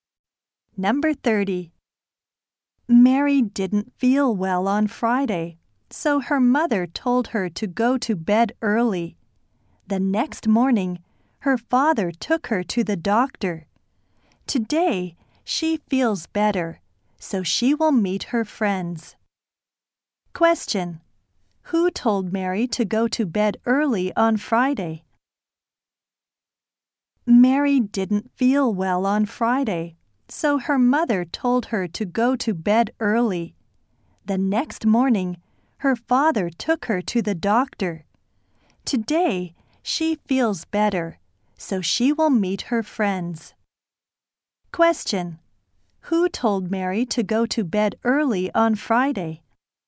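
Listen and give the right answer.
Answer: Her mother.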